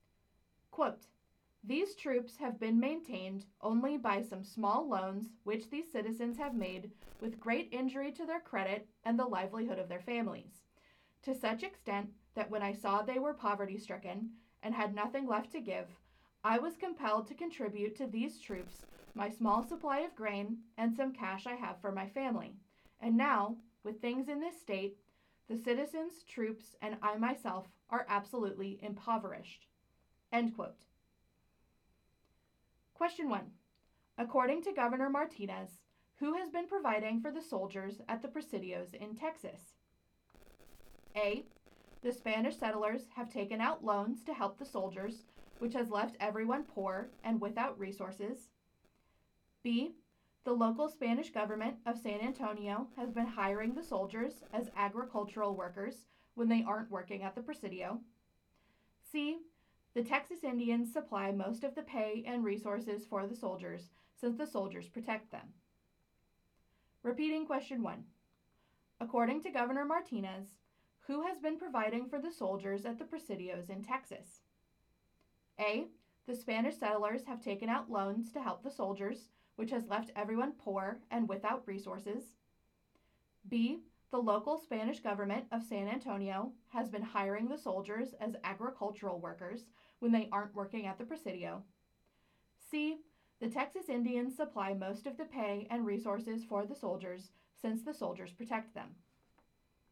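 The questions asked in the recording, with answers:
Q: According to Governor Martinez, who has been providing for the soldiers at the Presidios in Texas?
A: A: The Spanish settlers have taken out loans to help the soldiers, which has left everyone poor and without resources.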